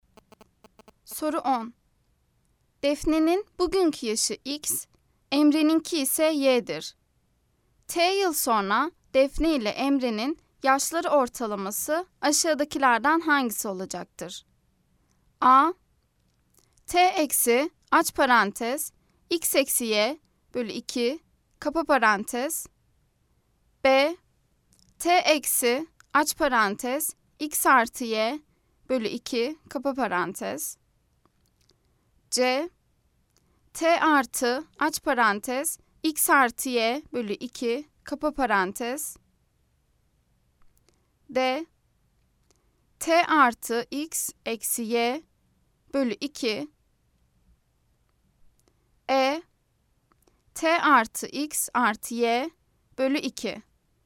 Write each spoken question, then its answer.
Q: T yıl sonra Defne ile Emre'nin yaşları ortalaması aşağıdakilerden hangisi olacaktır?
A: Cevap Ceyhan. T artı aç parantez X artı Y bölü 2 kapa parantez.